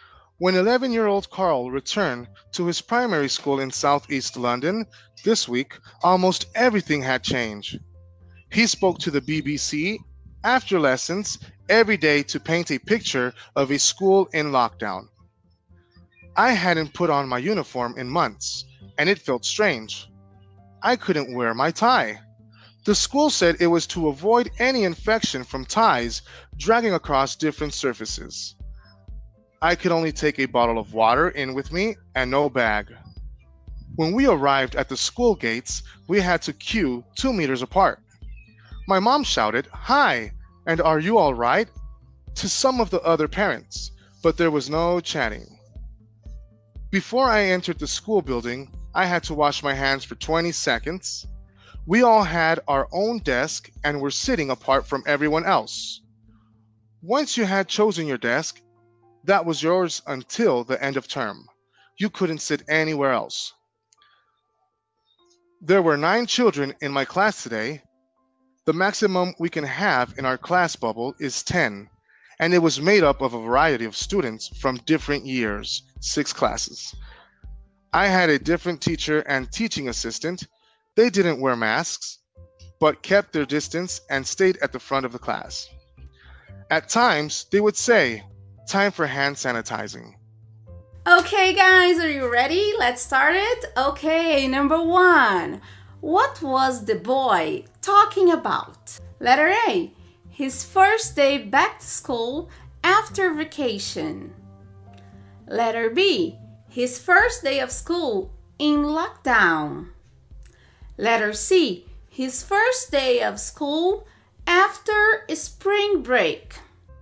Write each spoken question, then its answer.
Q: What was the boy talking about?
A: letter B is correct. If you got letter B, you're right.